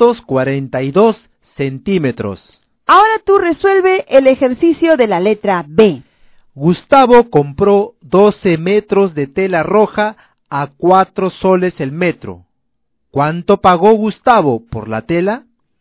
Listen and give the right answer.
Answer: ¿Te salió 48 la respuesta?